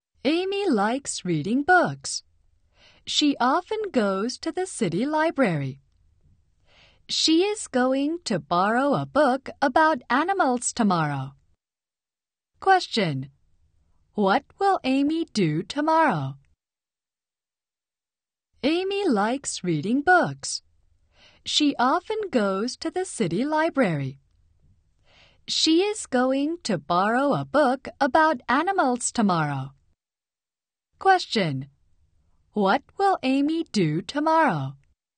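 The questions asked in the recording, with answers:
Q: What will Amy do tomorrow?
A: Borrow a book about animals from the city library.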